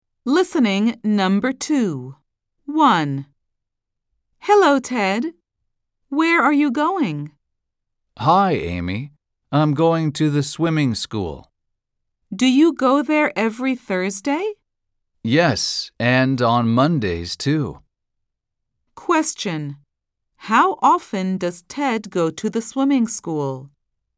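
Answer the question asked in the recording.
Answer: Twice a week (Mondays and Thursdays)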